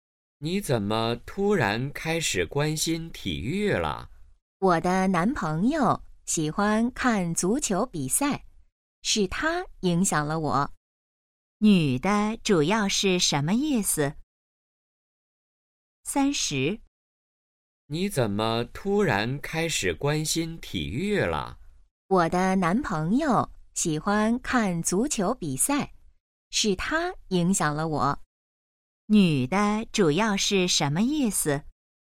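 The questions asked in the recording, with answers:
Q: 女的主要是什么意思?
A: 男朋友让她开始关心体育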